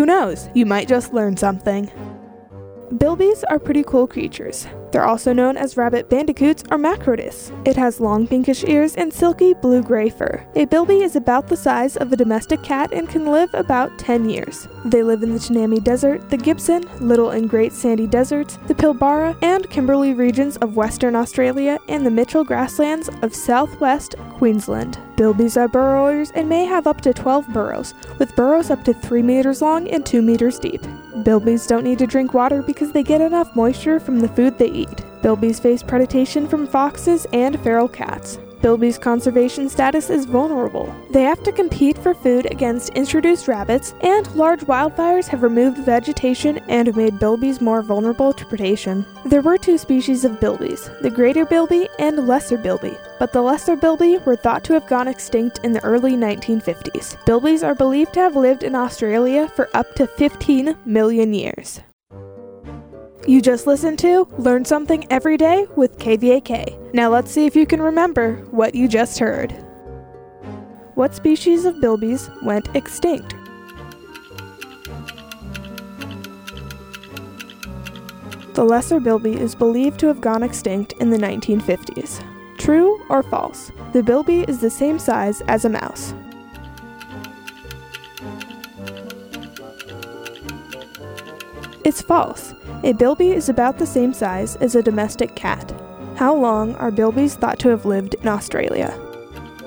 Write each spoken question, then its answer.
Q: What species of bilbies went extinct?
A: The lesser bilby is believed to have gone extinct in the 1950s.

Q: How long are bilbies thought to have lived in Australia?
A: It's believed that bilbies have lived in Australia for 15 million years.